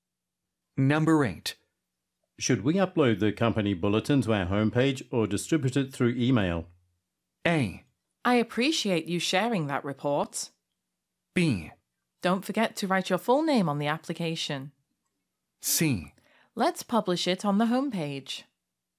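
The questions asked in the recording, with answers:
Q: Should we upload the company bulletin to our homepage or distribute it through email?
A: C: Let's publish it on the homepage.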